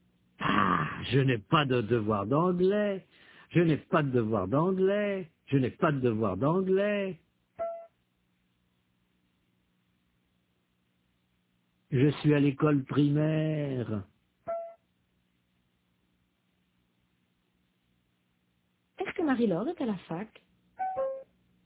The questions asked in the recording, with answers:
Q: Est-ce que Marie-Laure est à la fac?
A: Non, elle est à l'école primaire.